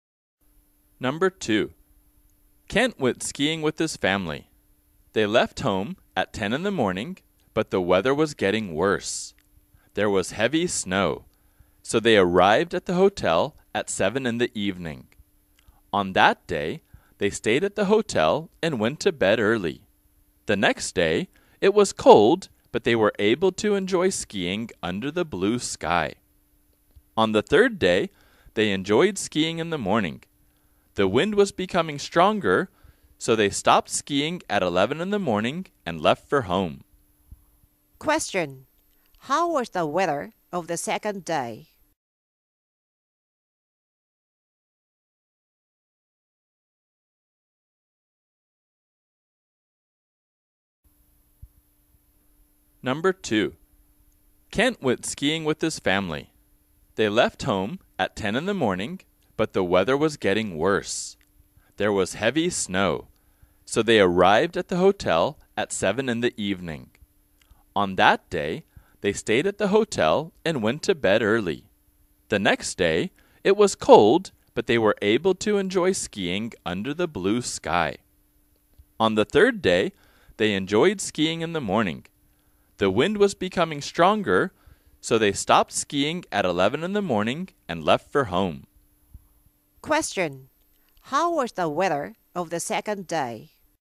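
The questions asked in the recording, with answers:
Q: how was the weather of the second day?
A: Cold but sunny (blue sky)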